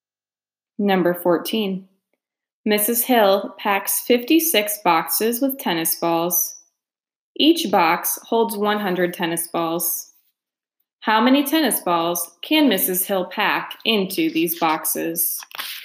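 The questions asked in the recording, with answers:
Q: How many tennis balls can Mrs.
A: 5,600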